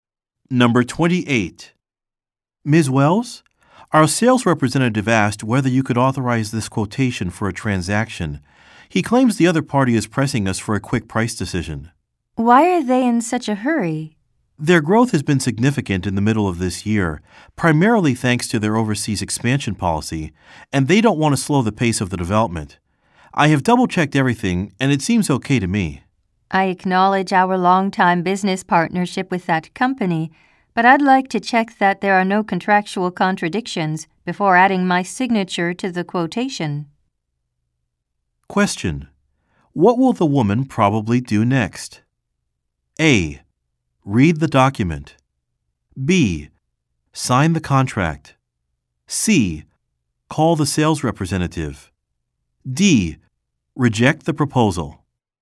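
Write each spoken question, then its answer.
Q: What will the woman probably do next?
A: A: Read the document.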